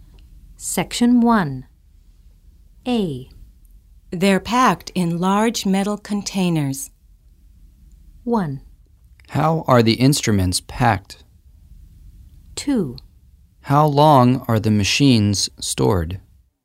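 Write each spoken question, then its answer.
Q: They're packed in large metal containers.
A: 1: How are the instruments packed?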